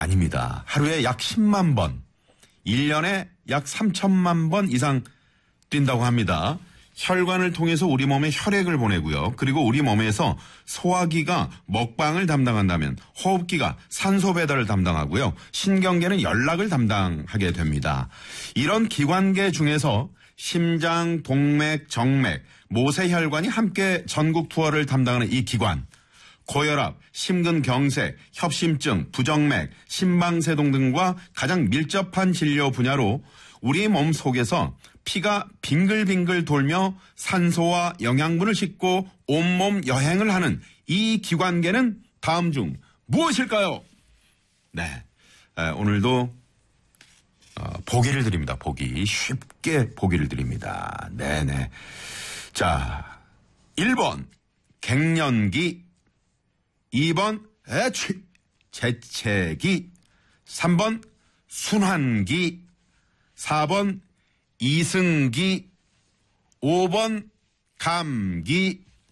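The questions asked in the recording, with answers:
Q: 고혈압, 심근경색, 협심증, 부정맥, 심방세동 등과 가장 밀접한 진료 분야로 우리 몸 속에서 피가 빙글빙글 돌며 산소와 영양분을 싣고 온몸 여행을 하는 이 기관계는 다음 중 무엇일까요?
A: 3: 순환기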